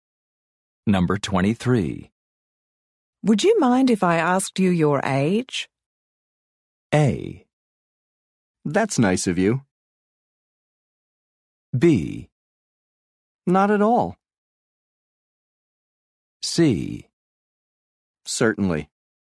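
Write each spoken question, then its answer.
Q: Would you mind if I asked you your age?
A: B: Not at all.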